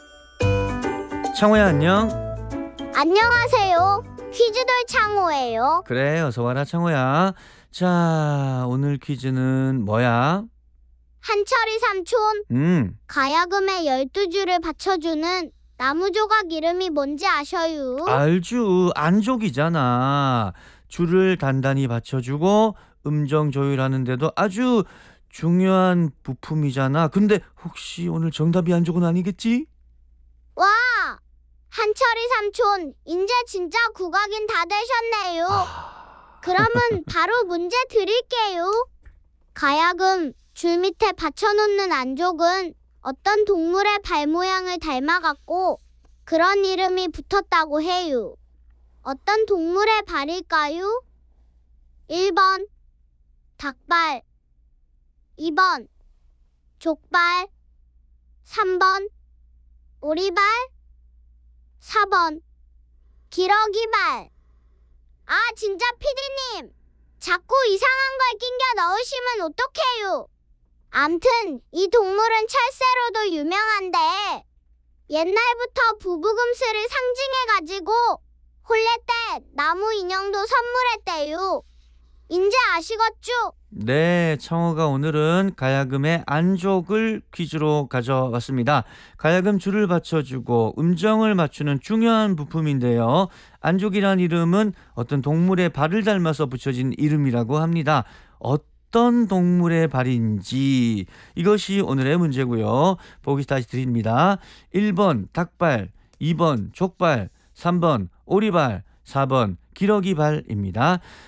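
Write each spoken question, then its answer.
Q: 어떤 동물의 발일까요? 1번 닭발, 2번 족발, 3번 오리발, 4번 기러기발.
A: 4: 기러기발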